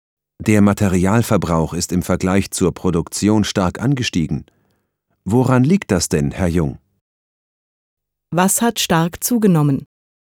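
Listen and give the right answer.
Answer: Der Materialverbrauch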